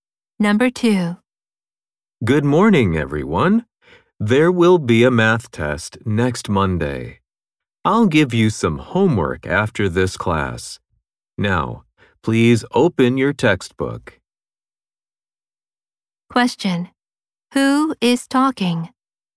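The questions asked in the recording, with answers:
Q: Who is talking?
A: A teacher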